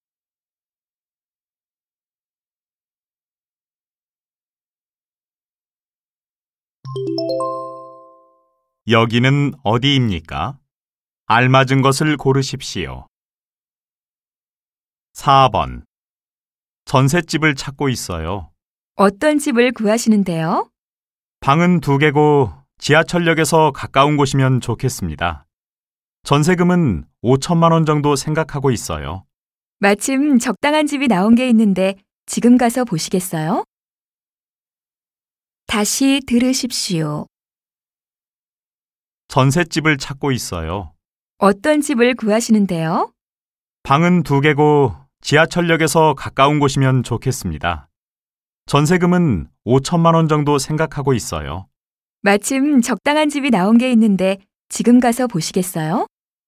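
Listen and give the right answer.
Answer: 부동산 중개업소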